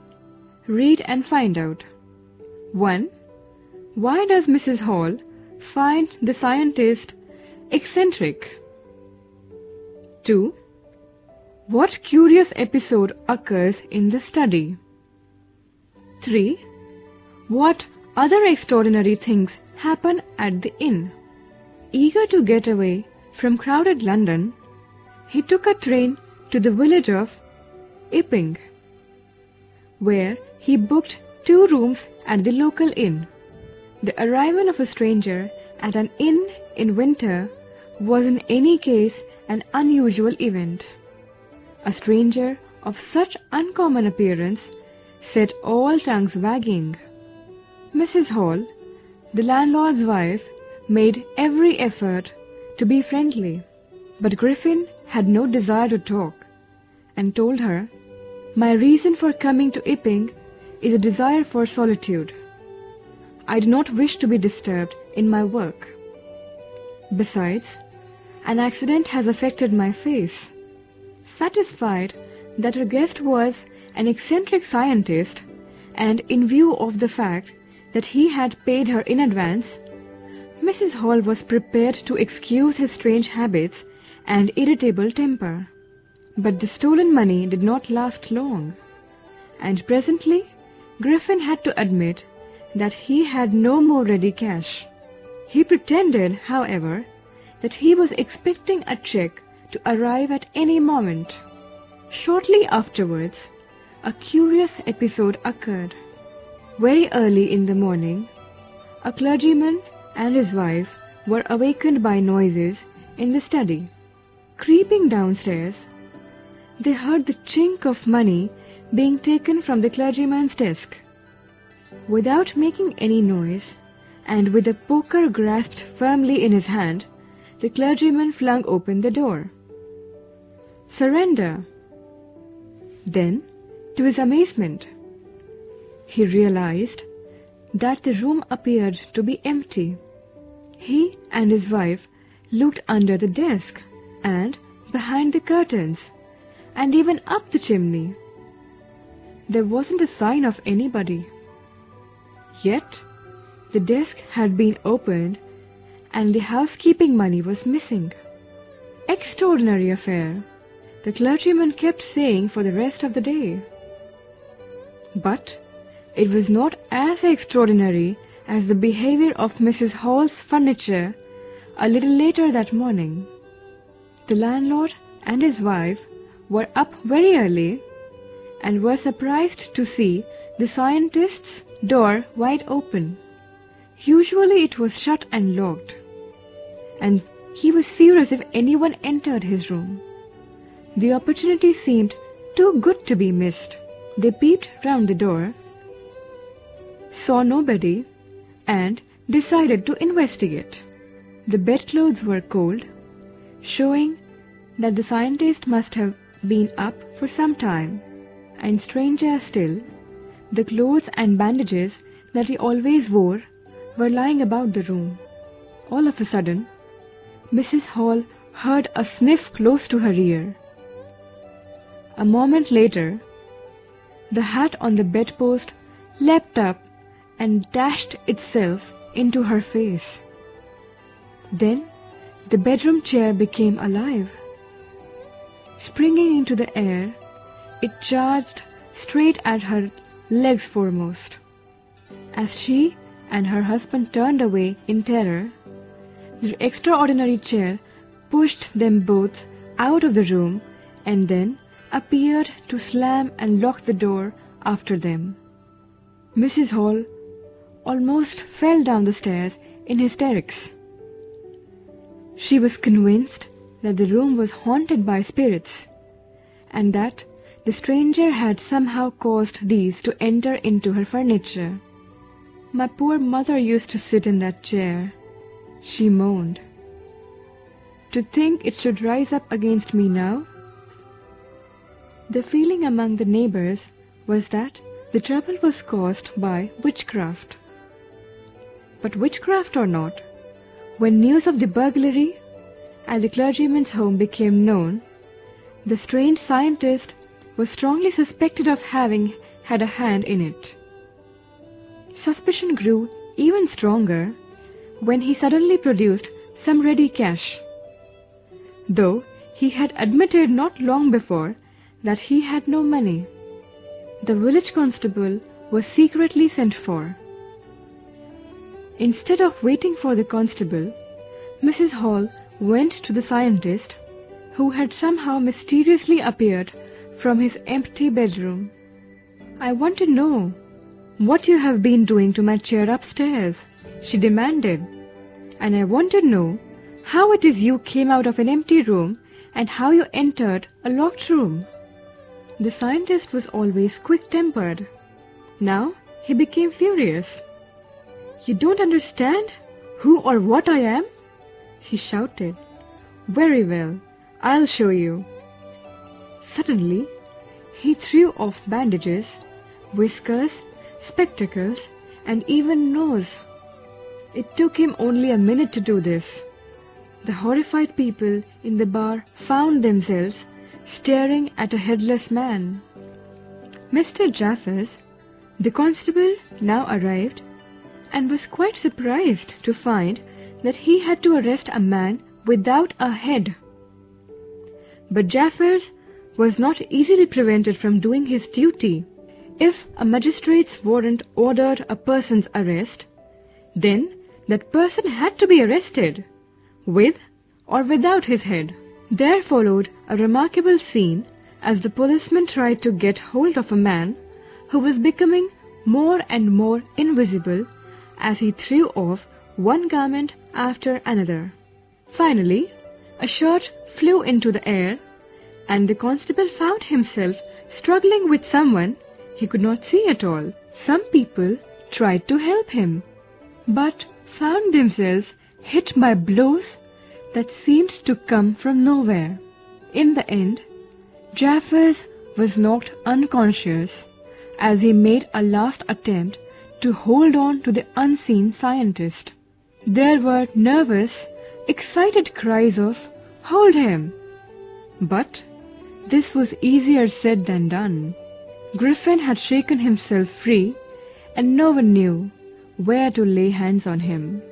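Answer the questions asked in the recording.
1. He wanted to be alone, didn't want to be disturbed in his work, wore bandages, and had strange habits and a bad temper
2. Money was taken from the clergyman's desk, but when he opened the door the room looked empty
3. The hat leapt into Mrs. Hall's face and the chair pushed her and her husband out of the room and the door locked behind them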